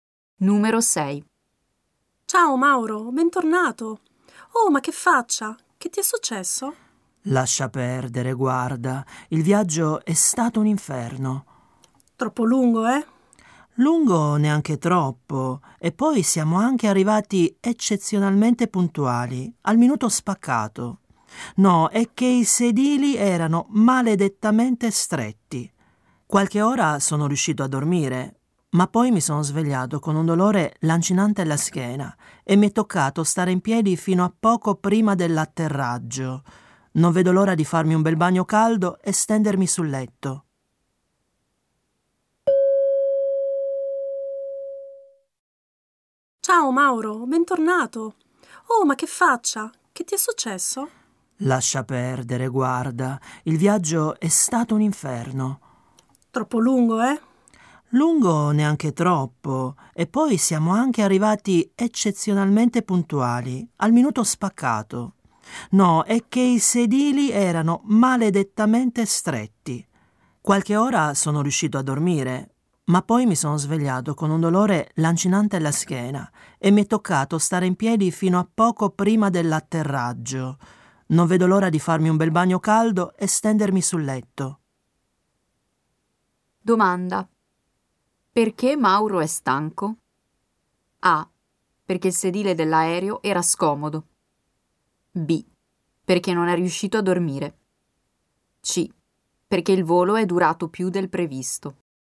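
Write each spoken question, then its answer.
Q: Perché Mauro è stanco?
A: A: Perché il sedile dell'aereo era scomodo.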